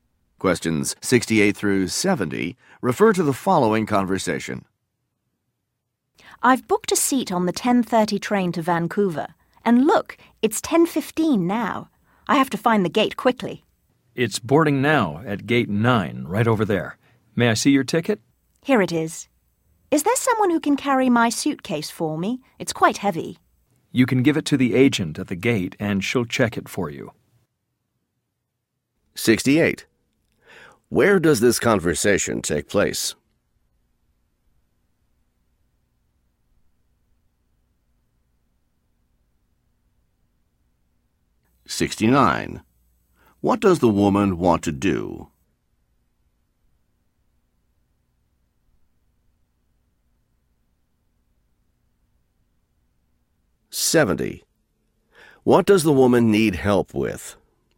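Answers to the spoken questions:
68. At a train station
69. Find her gate to catch the train
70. Carrying her heavy suitcase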